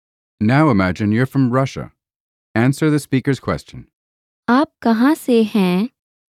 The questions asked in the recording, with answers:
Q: आप कहाँ से हैं?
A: मैं रूस से हूँ.